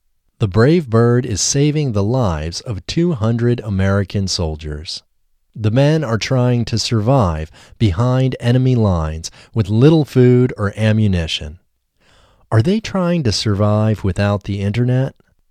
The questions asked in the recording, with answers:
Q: Are they trying to survive without the internet?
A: No, they aren't trying to survive without the internet.